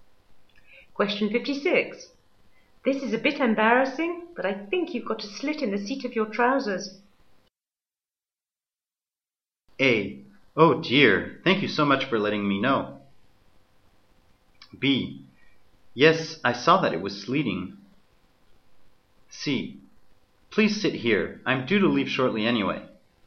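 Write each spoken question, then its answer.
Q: This is a bit embarrassing, but I think you've got a slit in the seat of your trousers.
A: A: Oh dear, thank you so much for letting me know.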